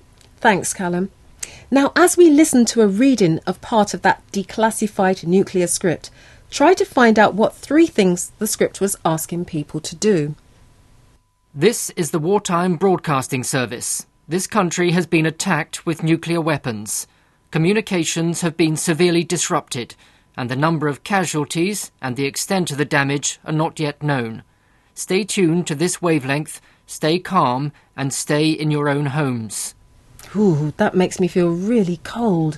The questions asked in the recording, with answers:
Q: try to find out what three things the script was asking people to do.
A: it told people to stay tuned